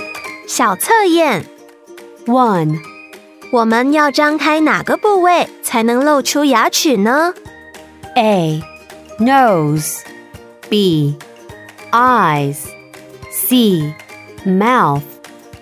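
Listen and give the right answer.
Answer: C: Mouth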